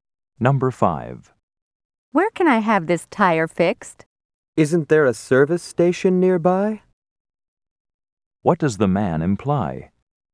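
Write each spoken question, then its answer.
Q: What does the man imply?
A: The tire can be fixed at a service station nearby.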